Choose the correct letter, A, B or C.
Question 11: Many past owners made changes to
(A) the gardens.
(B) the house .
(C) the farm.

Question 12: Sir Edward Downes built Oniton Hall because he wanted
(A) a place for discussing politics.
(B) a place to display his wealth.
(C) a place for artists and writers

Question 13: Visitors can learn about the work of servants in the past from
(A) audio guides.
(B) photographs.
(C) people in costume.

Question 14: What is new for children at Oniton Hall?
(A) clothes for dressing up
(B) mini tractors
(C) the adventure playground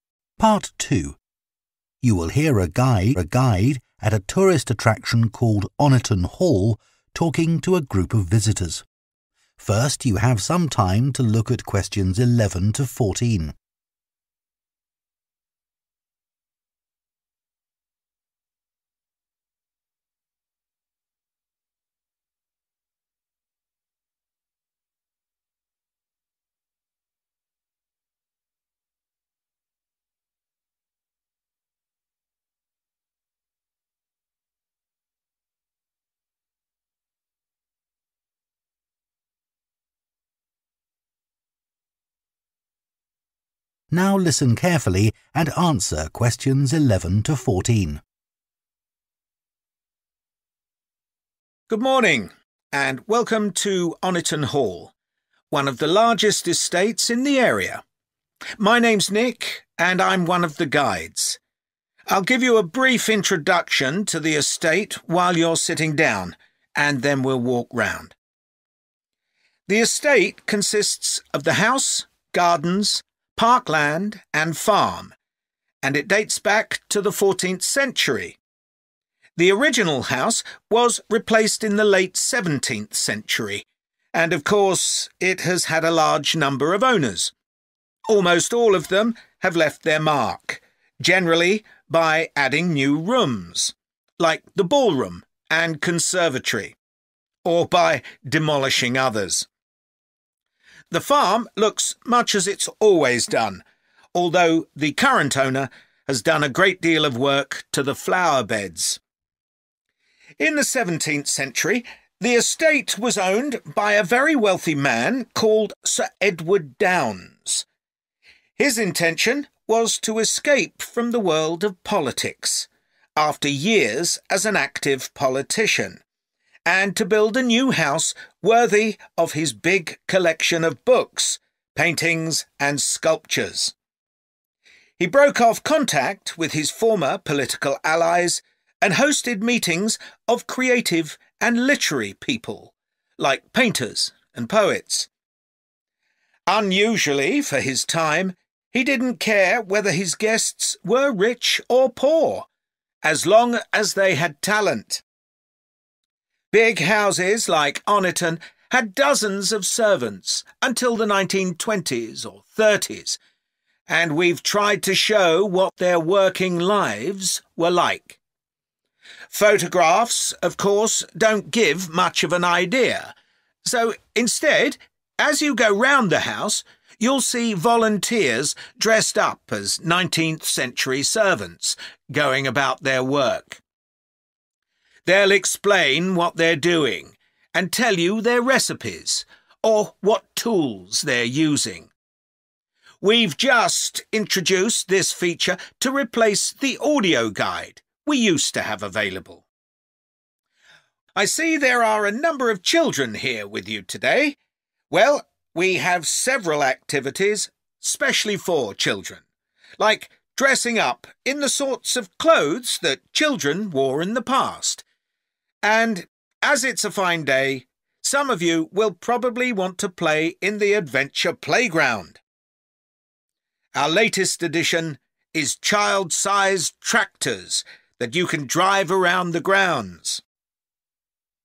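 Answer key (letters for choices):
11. B
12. C
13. C
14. B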